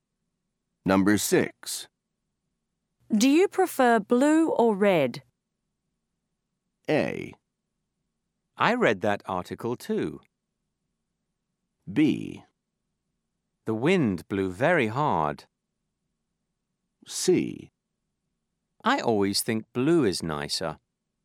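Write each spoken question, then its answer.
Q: Do you prefer blue or red?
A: C: I always think blue is nicer.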